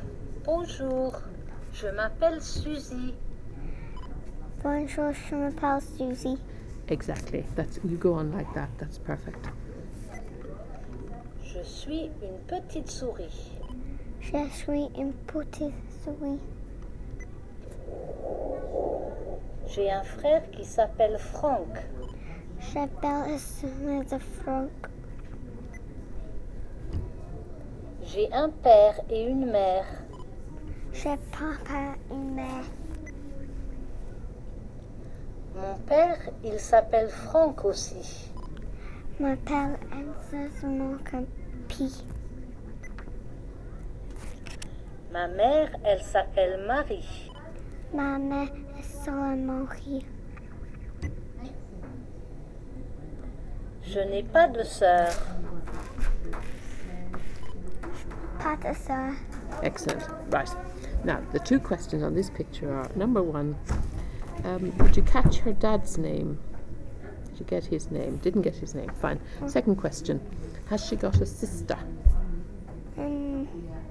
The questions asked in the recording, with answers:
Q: Has she got a sister?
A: No.